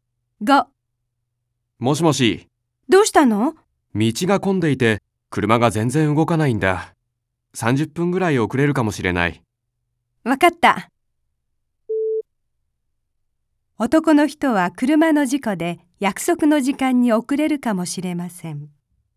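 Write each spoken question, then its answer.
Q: 男の人は車の事故で約束の時間に遅れるかもしれません。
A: ×(道が混んでいるから)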